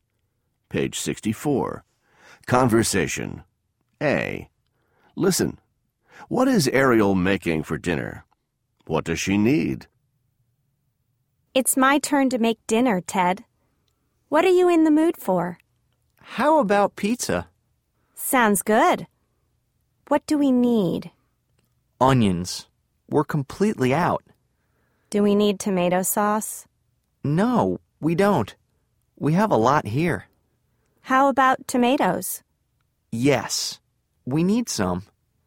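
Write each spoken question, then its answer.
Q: What is Ariel making for dinner?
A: Pizza

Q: What does she need?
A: Onions and tomatoes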